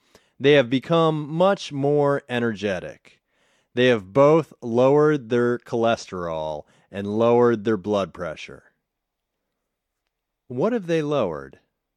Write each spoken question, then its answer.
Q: What have they lowered?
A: They have lowered their cholesterol and lowered their blood pressure.